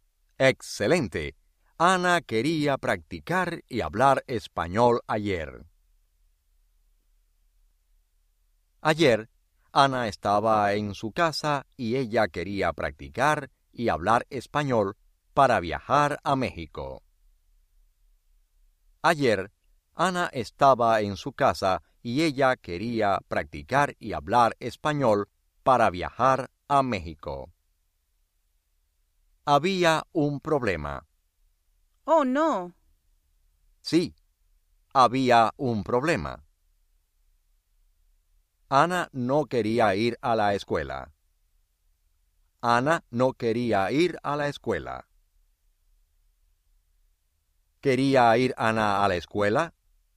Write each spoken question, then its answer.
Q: ¿Quería ir Ana a la escuela?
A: No.